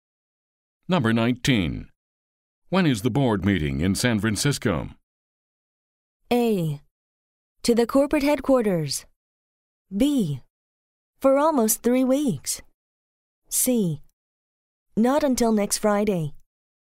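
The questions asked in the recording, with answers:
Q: When is the board meeting in San Francisco?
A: C: Not until next Friday.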